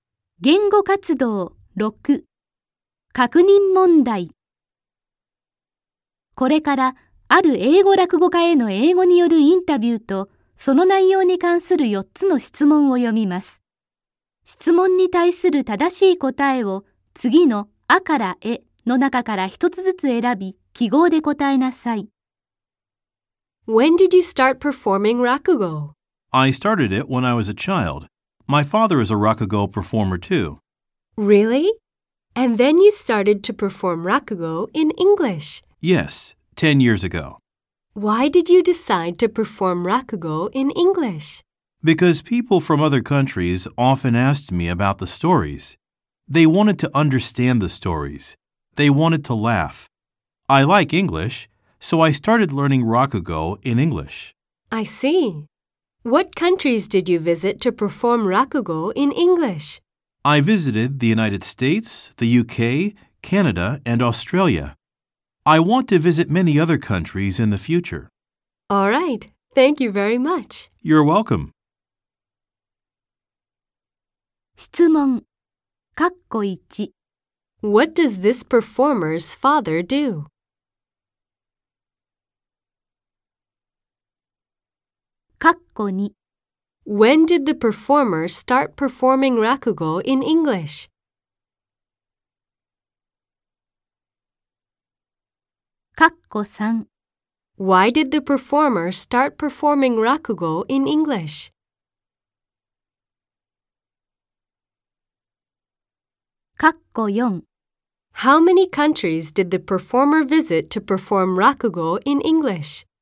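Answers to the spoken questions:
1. He is a rakugo performer.
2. 10 years ago
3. Because people from other countries often asked about the stories and wanted to understand them.
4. Four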